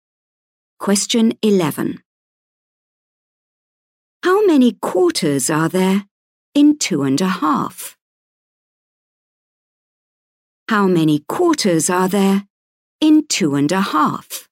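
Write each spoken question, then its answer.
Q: How many quarters are there in 2.5?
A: 10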